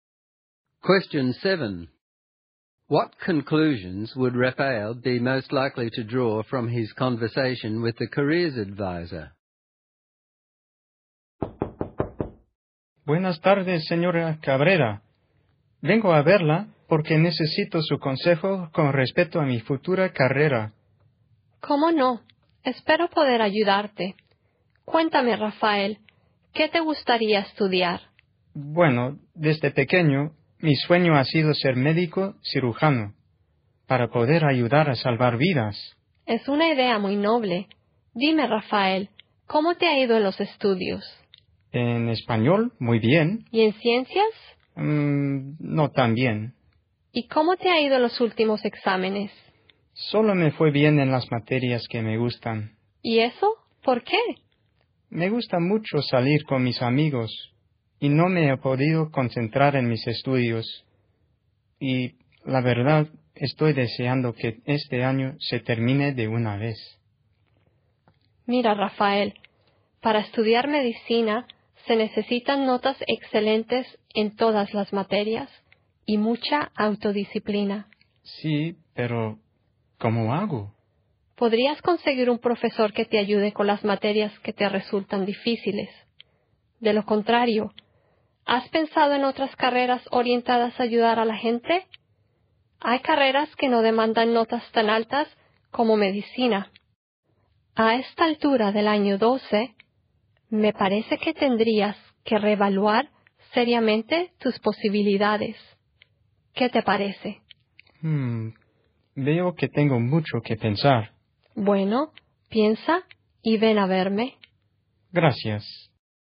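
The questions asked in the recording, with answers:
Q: What conclusions would Rafael be most likely to draw from his conversation with the careers advisor?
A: Medicine needs excellent marks and self-discipline, which he lacks, so he should either get a tutor or seriously think about other careers that help people.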